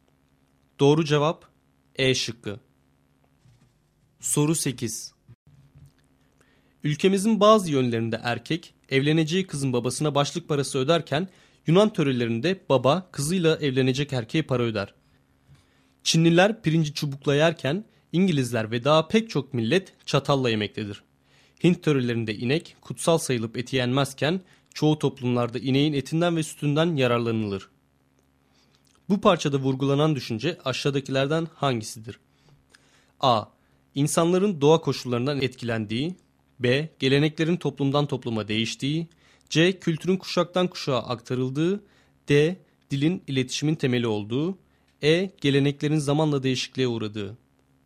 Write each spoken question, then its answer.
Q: Bu parçada vurgulanan düşünce aşağıdakilerden hangisidir?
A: Doğru cevap B şıkkı.